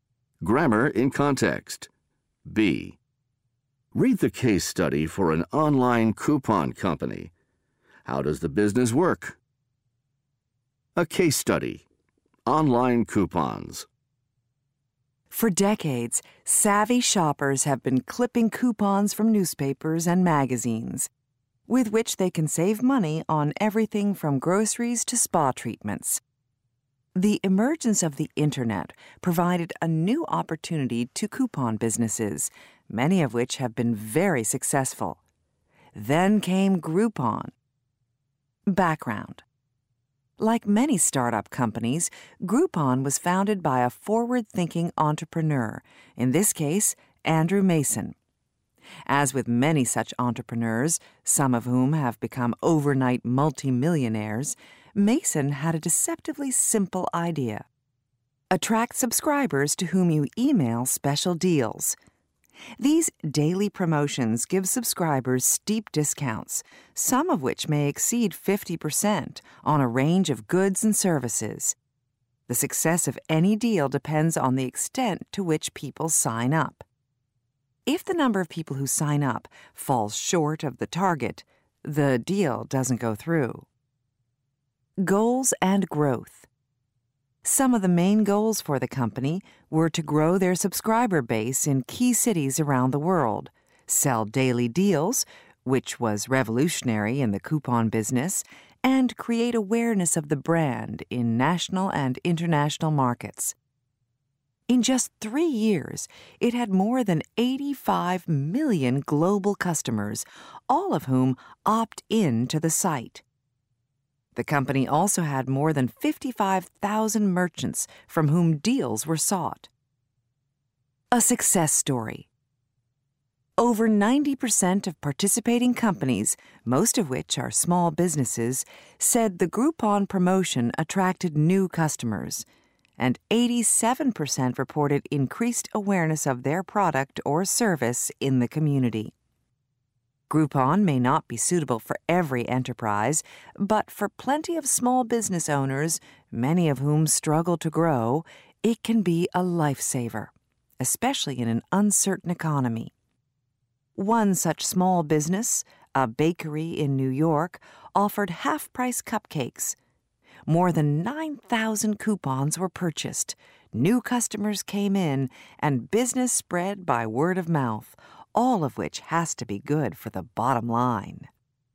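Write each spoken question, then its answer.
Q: How does the business work?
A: It emails subscribers daily deals with steep discounts; a deal goes through only if enough people sign up.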